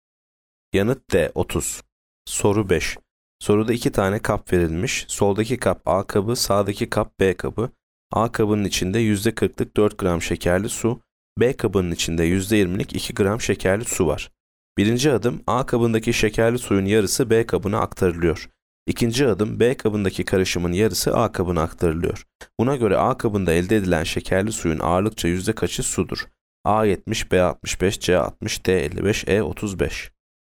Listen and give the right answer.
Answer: Yanıt B 65.